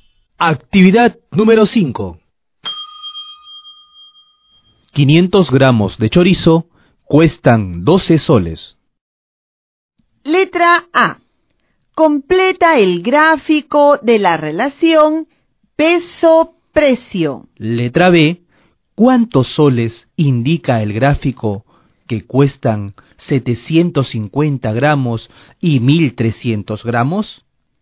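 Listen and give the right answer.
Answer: 18 soles y 31,20 soles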